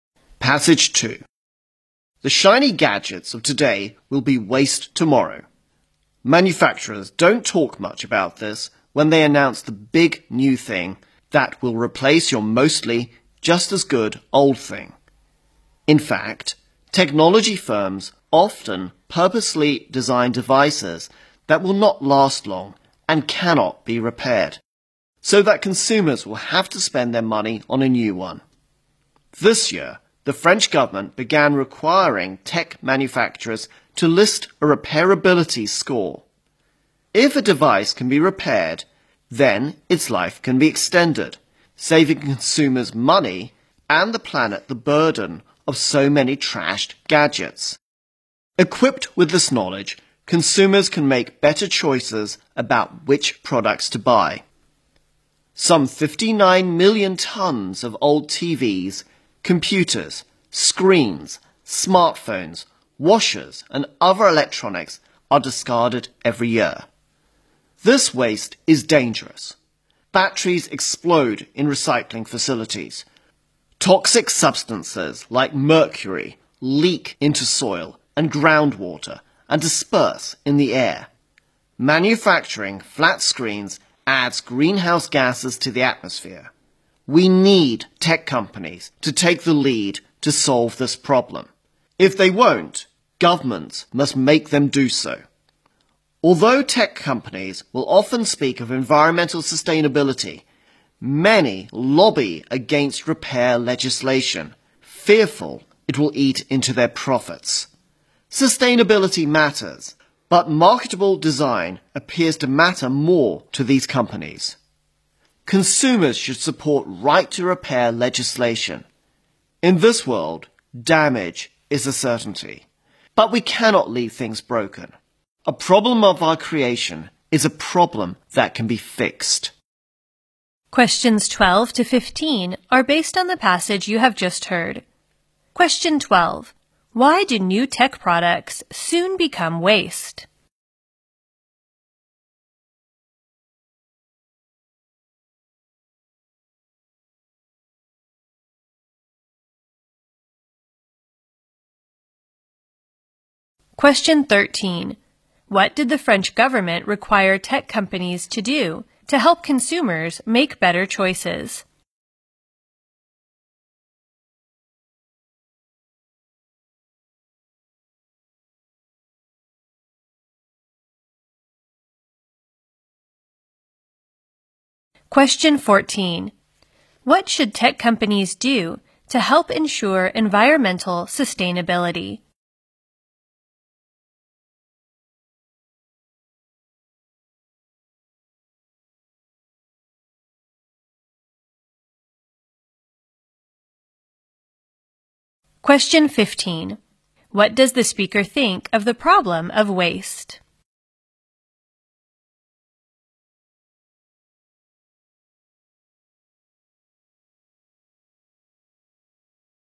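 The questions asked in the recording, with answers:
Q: Why do new tech products soon become waste?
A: Firms purposely design them not to last long and not to be repairable.

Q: What did the French government require tech companies to do to help consumers make better choices?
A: List a repairability score.

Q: What does the speaker think of the problem of waste?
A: It is a problem of our own creation that can be fixed.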